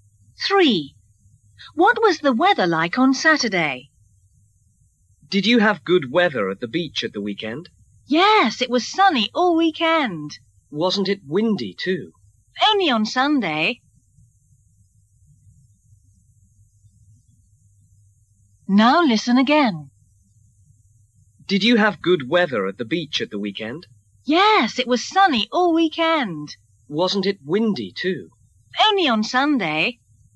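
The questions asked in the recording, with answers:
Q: What was the weather like on Saturday?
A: Sunny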